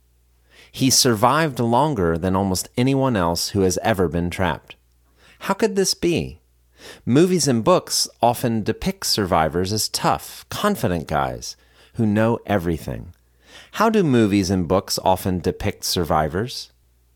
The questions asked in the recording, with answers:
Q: How do movies and books often depict survivors?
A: Movies and books often depict survivors as tough, confident guys who know everything.